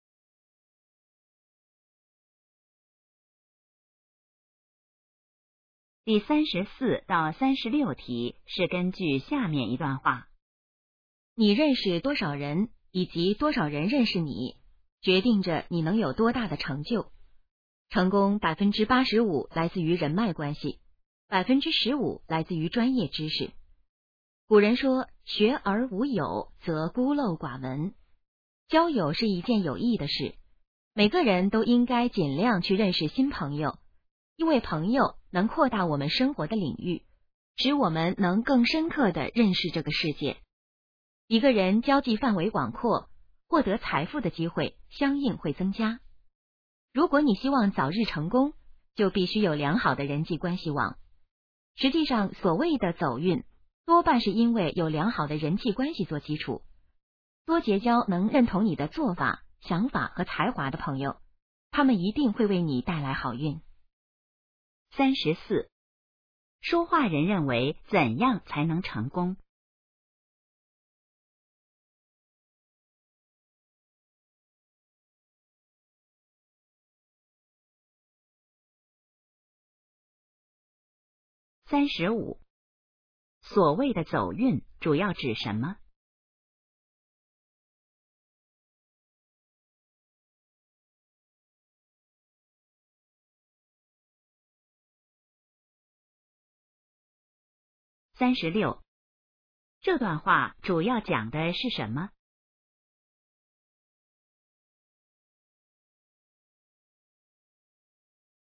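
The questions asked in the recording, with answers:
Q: 说话人认为怎样才能成功?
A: 要有良好的人际关系

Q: 所谓的走运主要指什么?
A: 有良好的人际关系做基础

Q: 这段话主要讲的是什么?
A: 人脉关系的重要性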